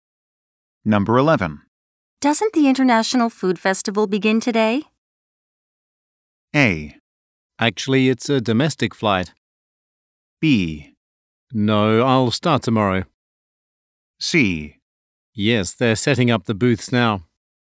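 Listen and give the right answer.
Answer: C: Yes, they're setting up the booths now.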